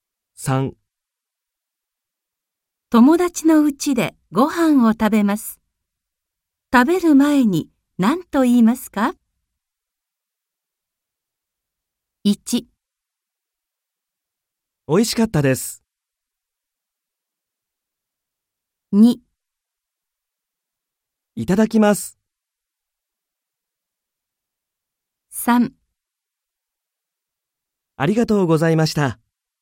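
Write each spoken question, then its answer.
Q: 友達の家でご飯を食べます。食べる前に何と言いますか?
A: 2: いただきます。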